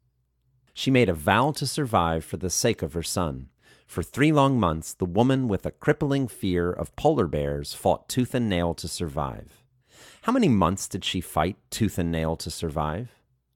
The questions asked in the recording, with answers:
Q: How many months did she fight tooth and nail to survive?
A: For 3 months, she fought tooth and nail to survive.